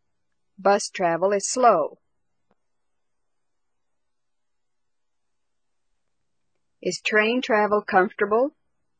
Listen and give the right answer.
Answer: Yes, train travel is comfortable.